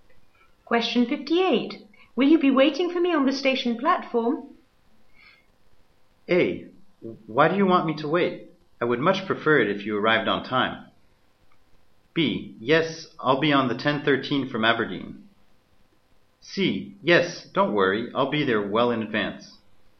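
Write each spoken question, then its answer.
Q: Will you be waiting for me on the station platform?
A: C: Yes, don't worry, I'll be there well in advance.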